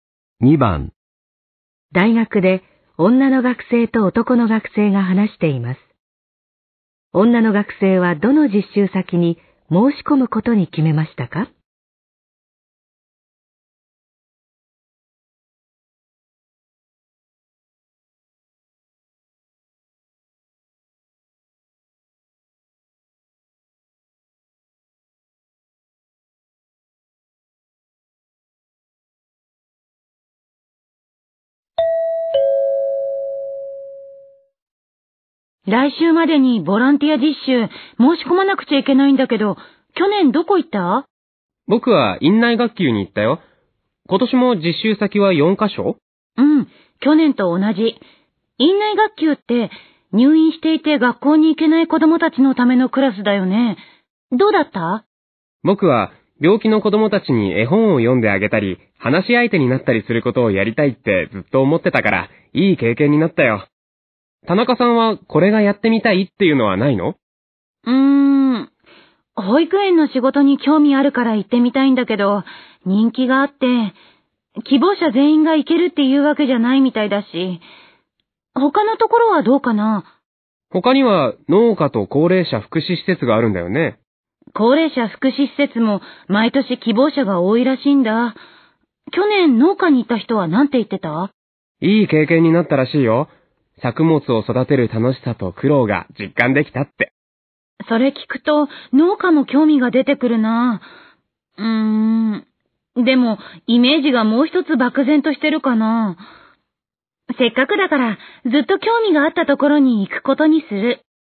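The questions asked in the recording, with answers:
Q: 女の学生はどの実習先に申し込むことに決めましたか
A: 保育園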